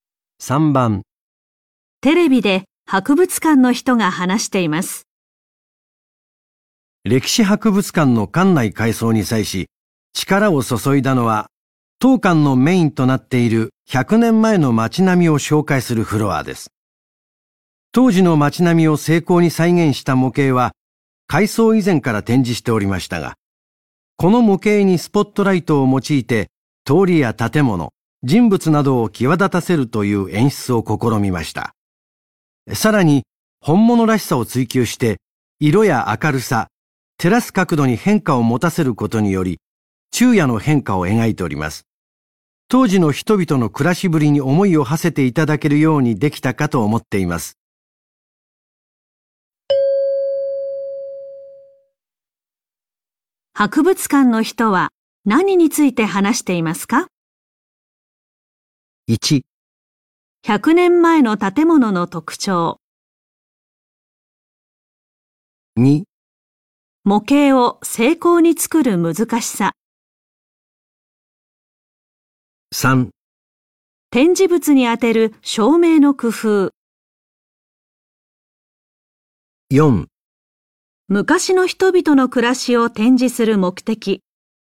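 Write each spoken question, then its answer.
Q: 博物館の人は何について話していますか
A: 3: 展示物に当てる照明の工夫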